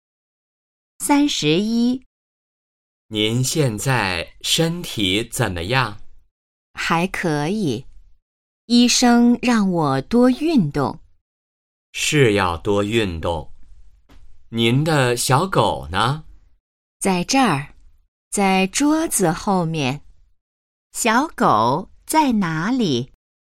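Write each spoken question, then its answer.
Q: 小狗在哪里?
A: 在桌子后面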